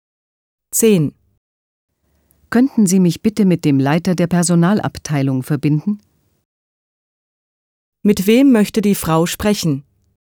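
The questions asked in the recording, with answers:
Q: Mit wem möchte die Frau sprechen?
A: Mit dem Leiter der Personalabteilung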